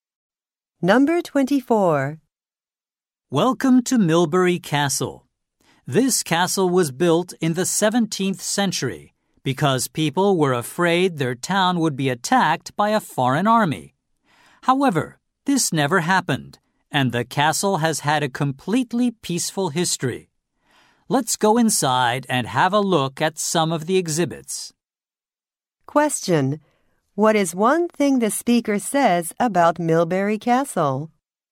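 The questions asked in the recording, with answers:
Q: What is one thing the speaker says about Milbury Castle?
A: It has never been attacked; it has had a peaceful history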